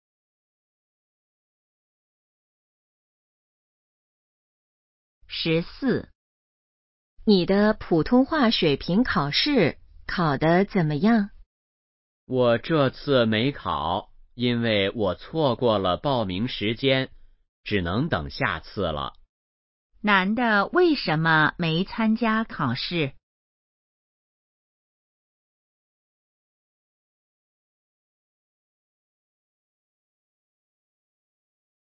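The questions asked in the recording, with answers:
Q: 男的为什么没参加考试?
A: 错过了报名时间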